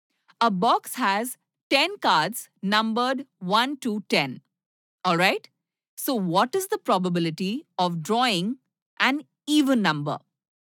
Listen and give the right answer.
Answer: So probability will be 5 divided by 10, which is 1 by 2.